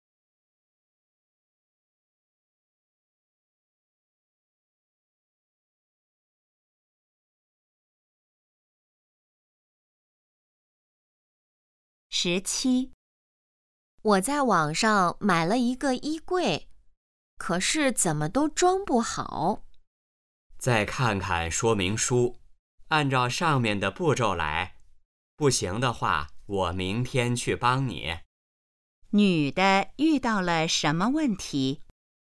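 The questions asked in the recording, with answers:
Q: 女的遇到了什么问题?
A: 衣柜装不好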